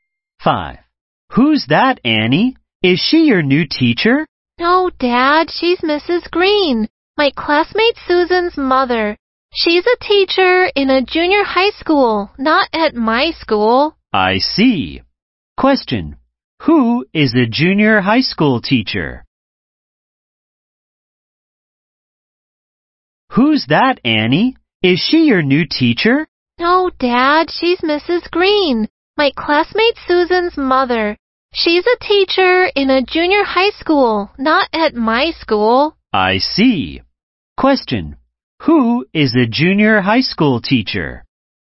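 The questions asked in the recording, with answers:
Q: Who is a junior high school teacher?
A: Mrs. Green, Susan's mother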